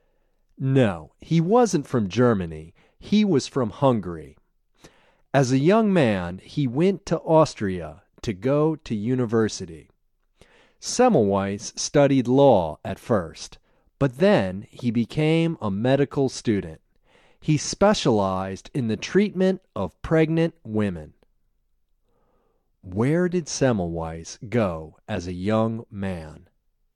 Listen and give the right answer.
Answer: As a young man, he went to Austria.